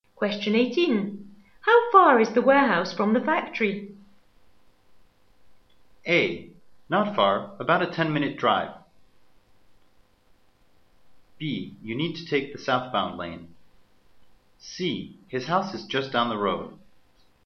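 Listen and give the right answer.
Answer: A: Not far, about a 10-minute drive.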